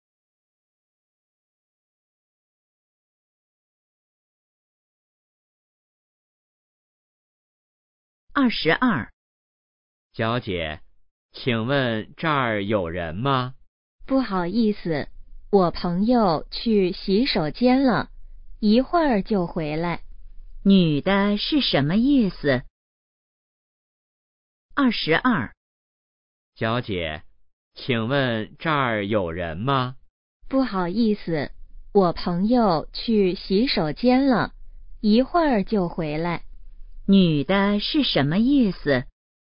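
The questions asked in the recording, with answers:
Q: 女的是什么意思?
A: 这儿有人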